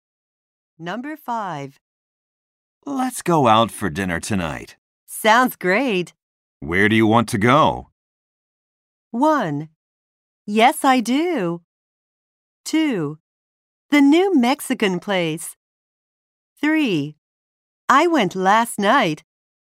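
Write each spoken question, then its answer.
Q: Where do you want to go?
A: 2: The new Mexican place.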